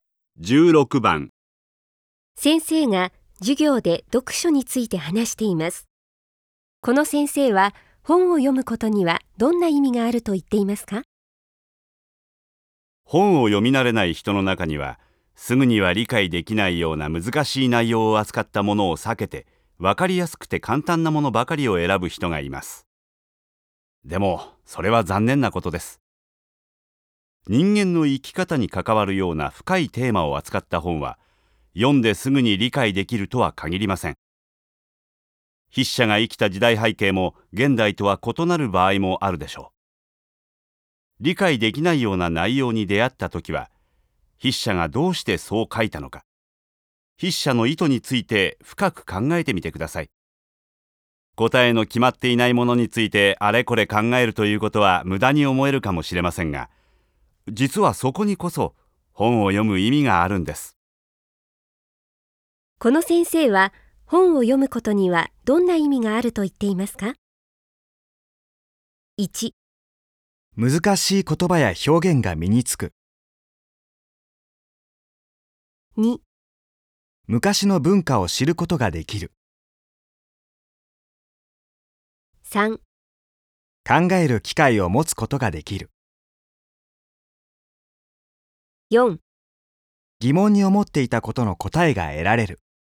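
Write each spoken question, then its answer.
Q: この先生は本を読むことにはどんな意味があると言っていますか?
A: 3: 考える機会を持つことができる。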